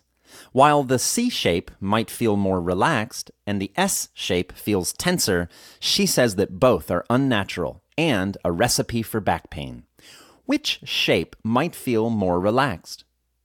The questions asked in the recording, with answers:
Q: Which shape might feel more relaxed?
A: The C shape might feel more relaxed.